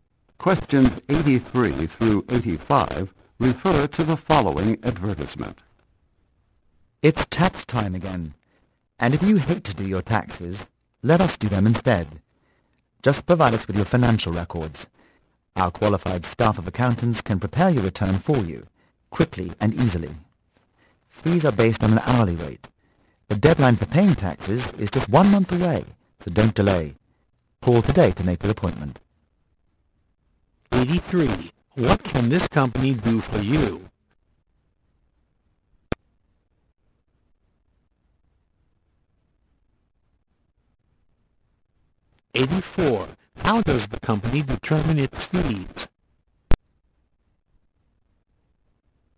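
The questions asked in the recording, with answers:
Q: What can this company do for you?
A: Prepare your tax return

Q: How does the company determine its fees?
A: By an hourly rate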